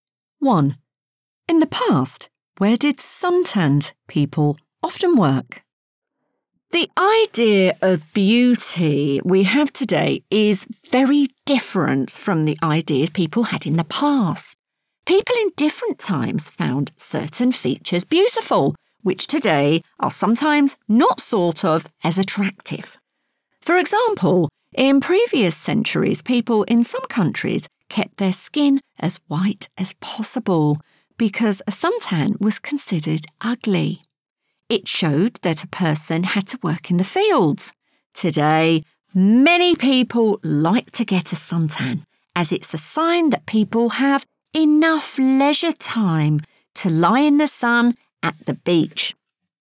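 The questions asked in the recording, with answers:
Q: In the past, where did suntanned people often work?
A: in the fields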